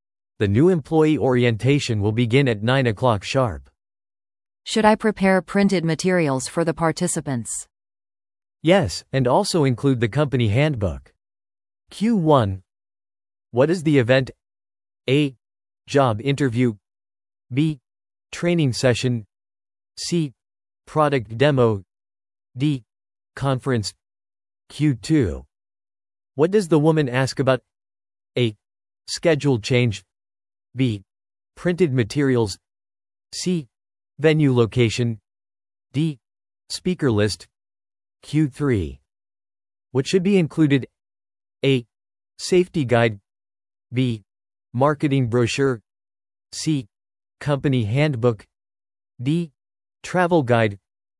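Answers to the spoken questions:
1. B: Training session.
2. B: Printed materials.
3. C: Company handbook.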